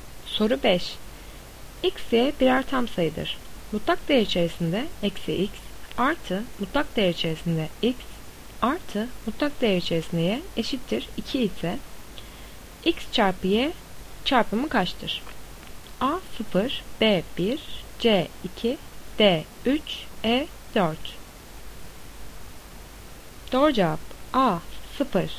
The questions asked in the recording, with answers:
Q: Mutlak değer içerisinde eksi X artı mutlak değer içerisinde X artı mutlak değer içerisinde y eşittir 2 ise x çarpı y çarpımı kaçtır?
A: Doğru cevap A 0.